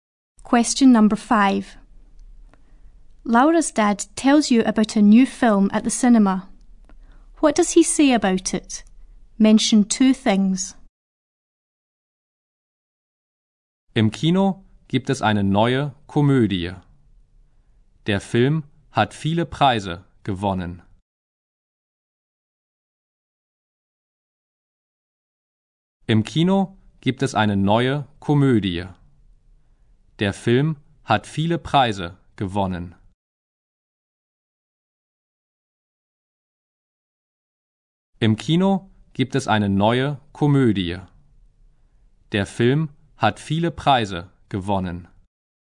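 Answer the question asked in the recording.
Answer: It's a new comedy; it has won many prizes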